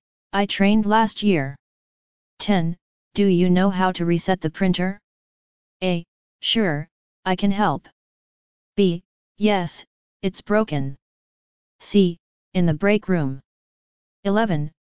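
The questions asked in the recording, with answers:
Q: Do you know how to reset the printer?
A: A: Sure, I can help.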